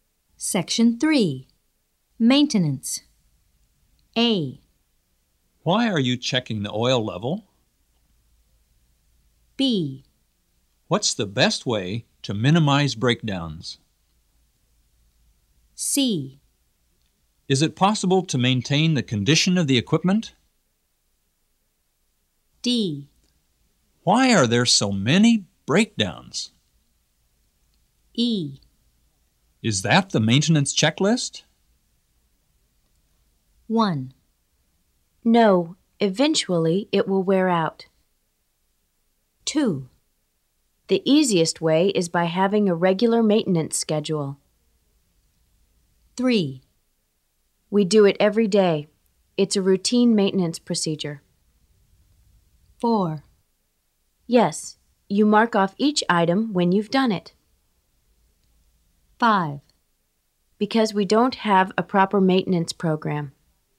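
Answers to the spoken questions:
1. C: Is it possible to maintain the condition of the equipment?
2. B: What's the best way to minimize breakdowns?
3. A: Why are you checking the oil level?
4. E: Is that the maintenance checklist?
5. D: Why are there so many breakdowns?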